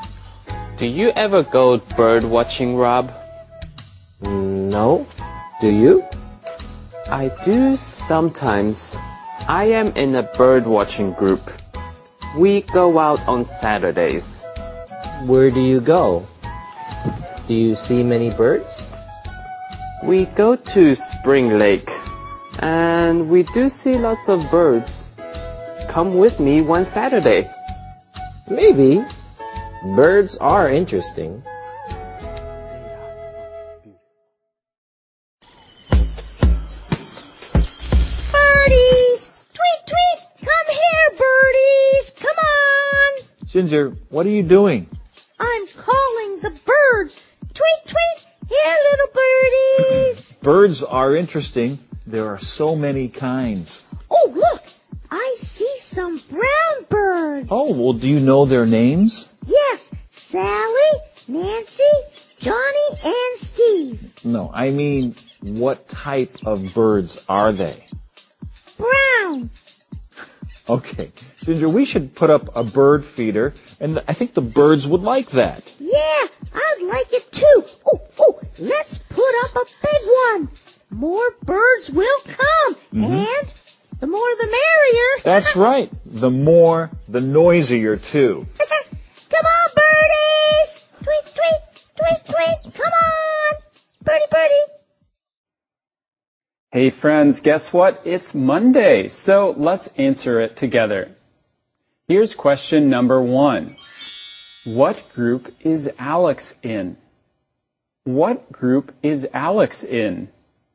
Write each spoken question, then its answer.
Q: What group is Alex in?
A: Alex is in a bird watching group.